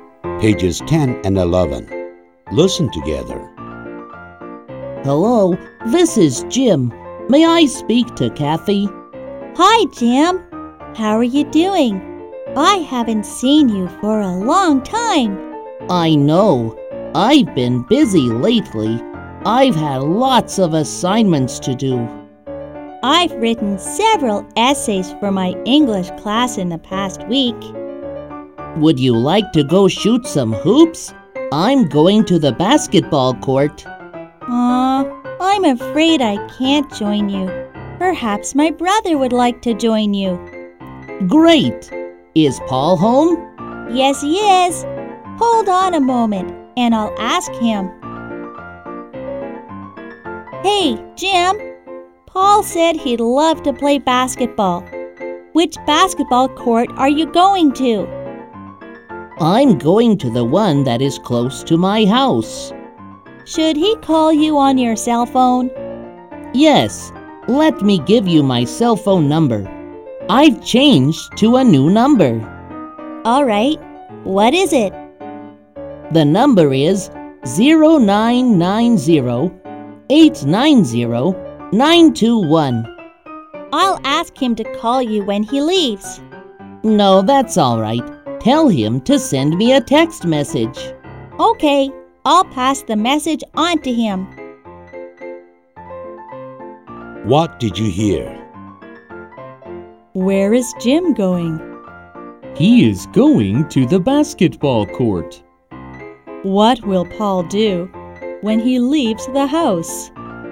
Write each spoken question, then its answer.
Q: What will Paul do when he leaves the house?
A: He will send a text message to Jim when he leaves.